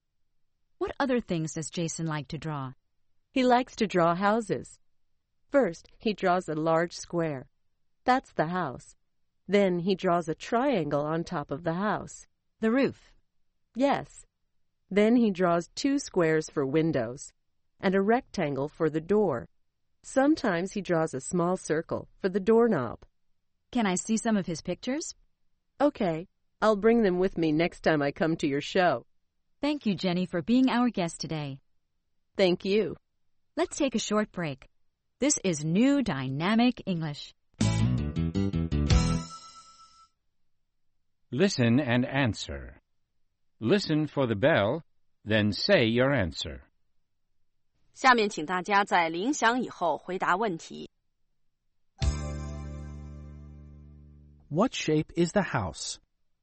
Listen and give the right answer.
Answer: It's a square.